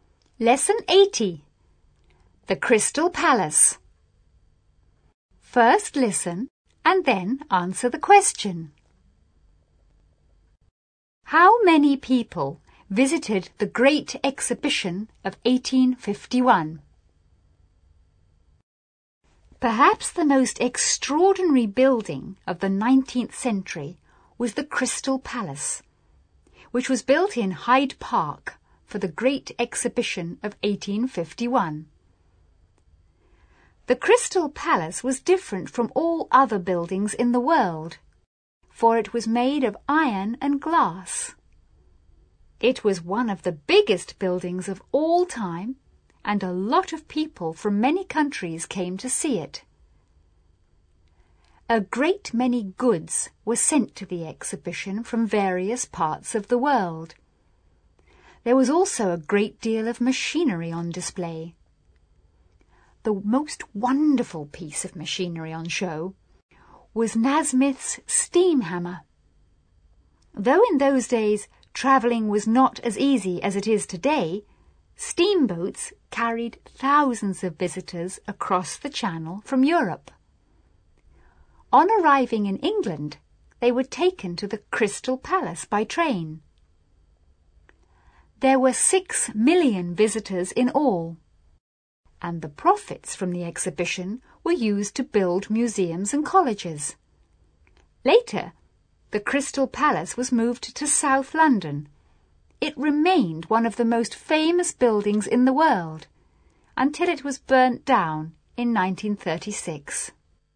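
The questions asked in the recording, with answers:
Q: How many people visited the Great Exhibition of 1851?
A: 6 million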